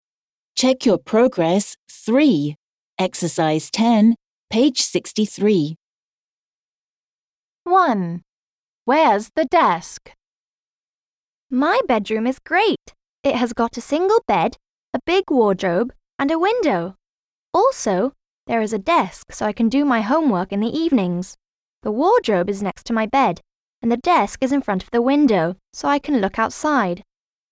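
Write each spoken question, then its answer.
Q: Where's the desk?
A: In front of the window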